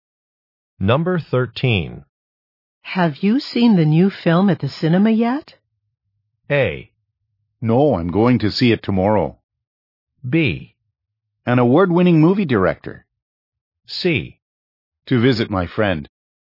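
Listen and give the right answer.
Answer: A: No, I'm going to see it tomorrow.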